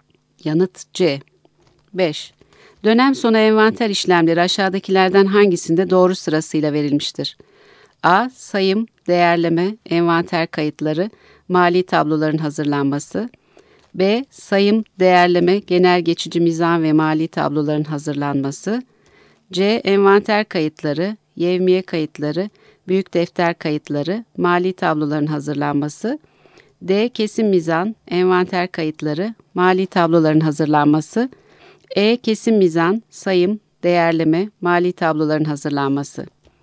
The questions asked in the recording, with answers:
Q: Dönem sonu envanter işlemleri aşağıdakilerden hangisinde doğru sırasıyla verilmiştir?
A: Yanıt A.